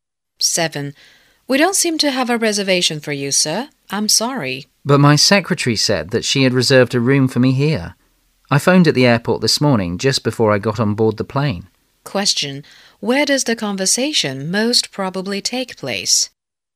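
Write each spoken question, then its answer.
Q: Where does the conversation most probably take place?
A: At a hotel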